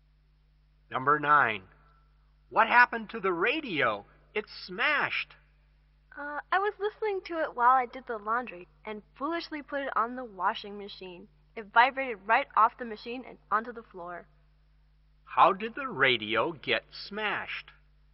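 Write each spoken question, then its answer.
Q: How did the radio get smashed?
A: It vibrated off the washing machine onto the floor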